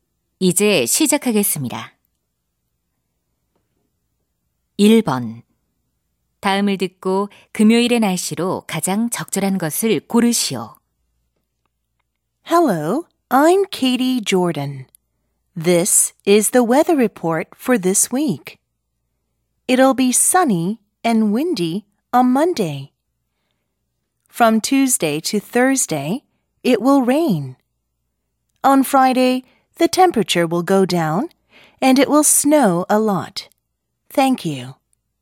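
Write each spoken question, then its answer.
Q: 다음을 듣고 금요일의 날씨로 가장 적절한 것을 고르시오.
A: 눈이 많이 옴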